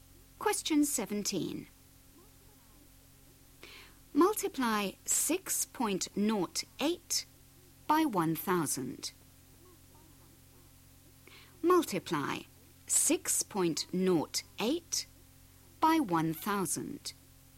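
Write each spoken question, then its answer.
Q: Multiply 6.08 by 1,000.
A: 6080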